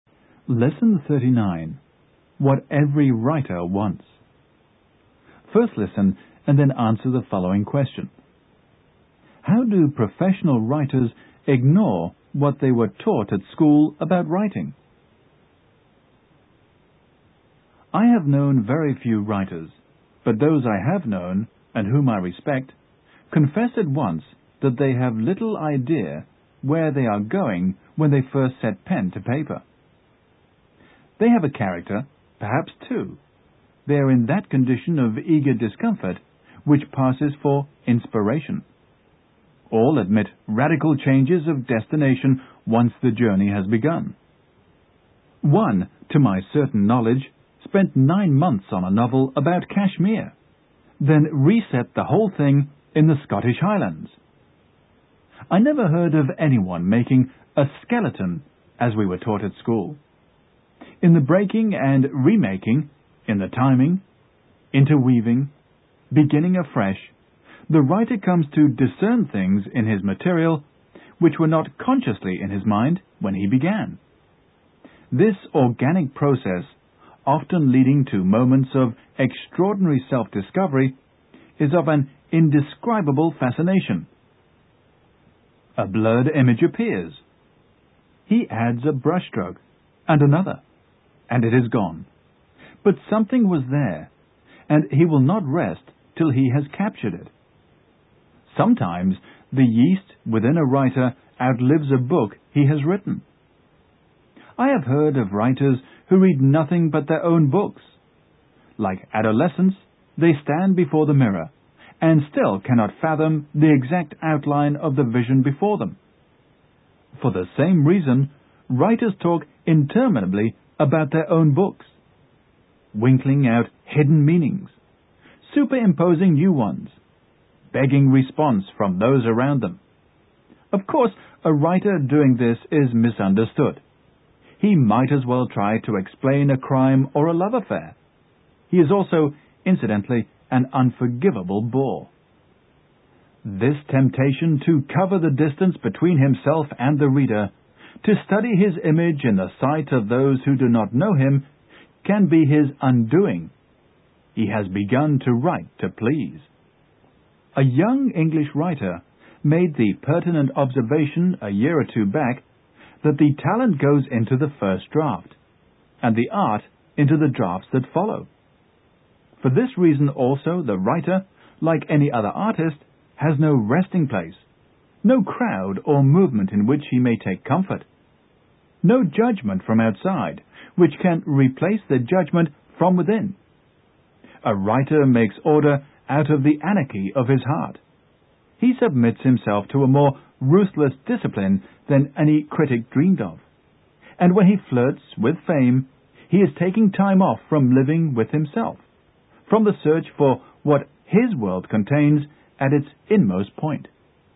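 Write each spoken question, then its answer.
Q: How do professional writers ignore what they were taught at school about writing?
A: They don't make a skeleton (outline) before writing; they start with little idea where they are going.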